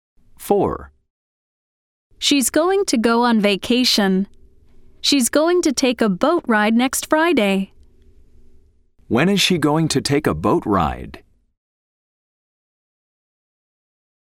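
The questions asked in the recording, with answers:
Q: When is she going to take a boat ride?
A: next Friday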